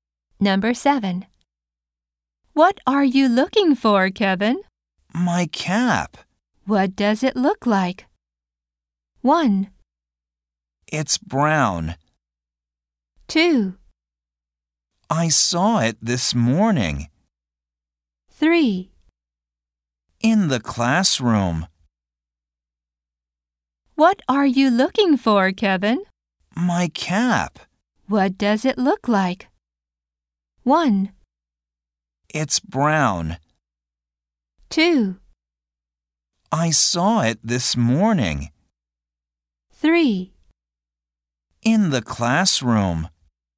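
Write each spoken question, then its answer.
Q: What does it look like?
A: 1: It's brown.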